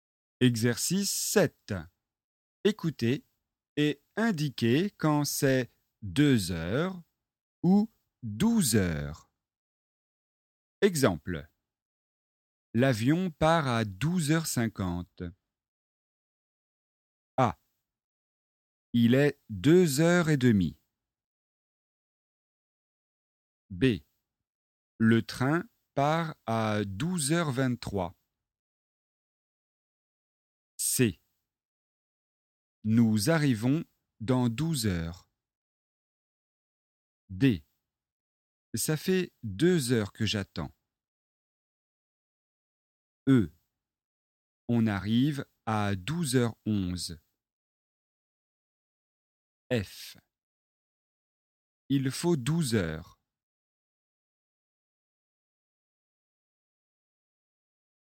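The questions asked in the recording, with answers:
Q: A. Il est 2h30.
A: 2 heures

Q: B. Le train part à 12h23.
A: 12 heures

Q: C. Nous arrivons dans 12 heures.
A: 12 heures

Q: D. Ça fait 2 heures que j'attends.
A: 2 heures

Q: E. On arrive à 12h11.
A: 12 heures

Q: F. Il faut 12 heures.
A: 12 heures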